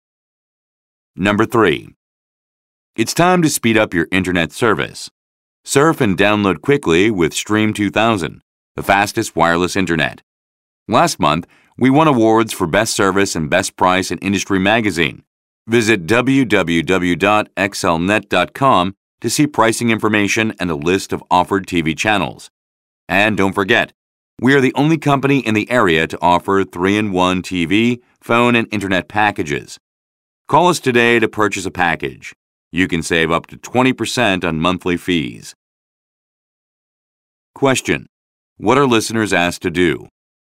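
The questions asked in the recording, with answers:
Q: What are listeners asked to do?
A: Call today to purchase a package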